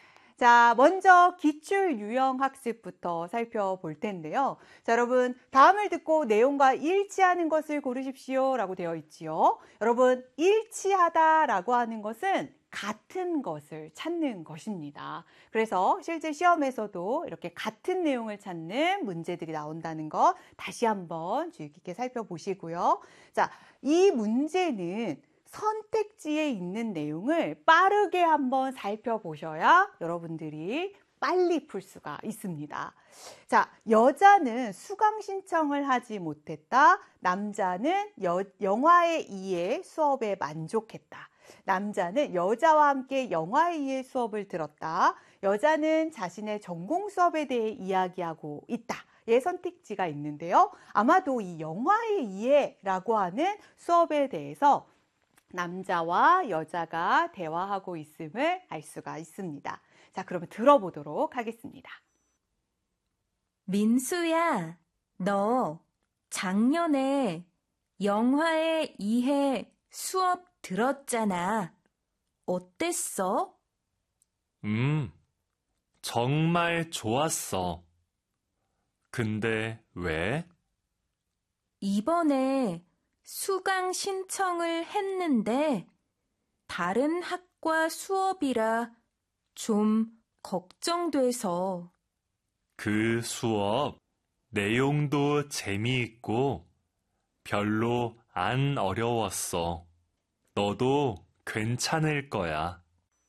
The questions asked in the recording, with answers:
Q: 다음을 듣고 내용과 일치하는 것을 고르십시오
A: 바로 정답은 2번. 수업에 만족했다 라는 것을 알 수가 있습니다.